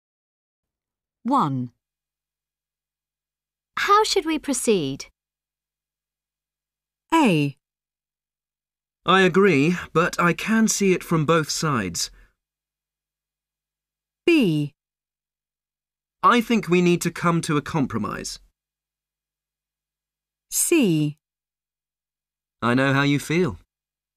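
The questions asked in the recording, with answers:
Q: How should we proceed?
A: B: I think we need to come to a compromise.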